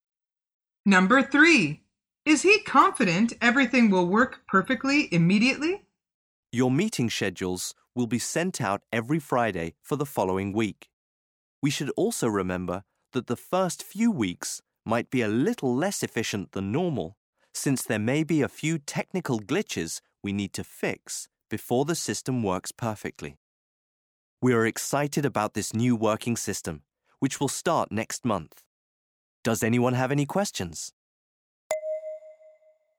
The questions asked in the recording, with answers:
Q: Is he confident everything will work perfectly immediately?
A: The answer is no.